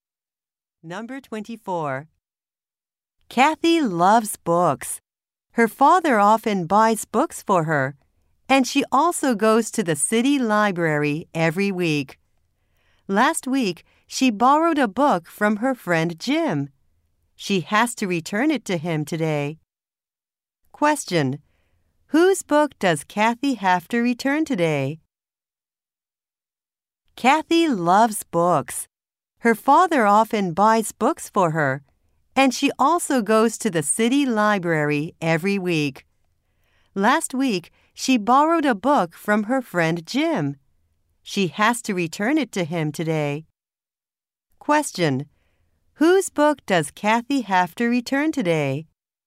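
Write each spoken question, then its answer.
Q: Whose book does Kathy have to return today?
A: Jim's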